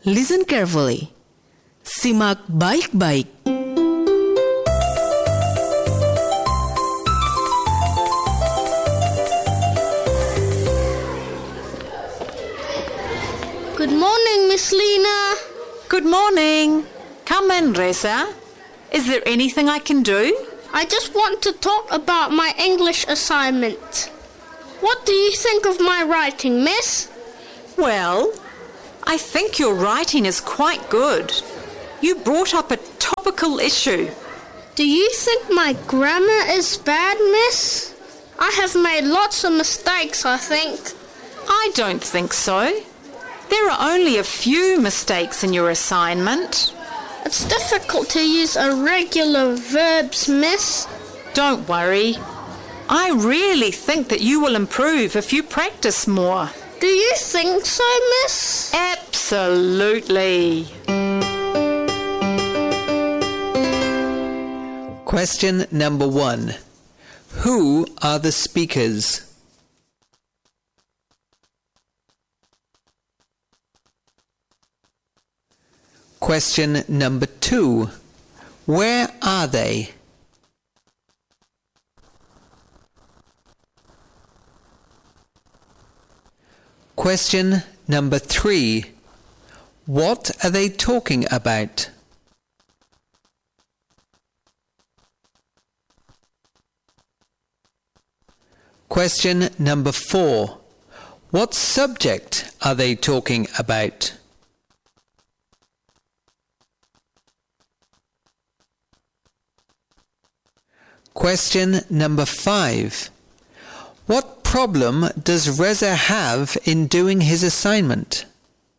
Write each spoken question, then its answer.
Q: Who are the speakers?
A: The speakers are a teacher and a student.

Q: What are they talking about?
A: Reza's English assignment.

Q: What subject are they talking about?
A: English.

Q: What problem does Reza have in doing his assignment?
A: Irregular past forms.